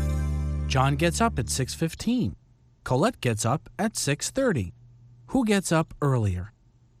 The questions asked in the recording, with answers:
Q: Who gets up earlier?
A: John does. John gets up earlier than Colette.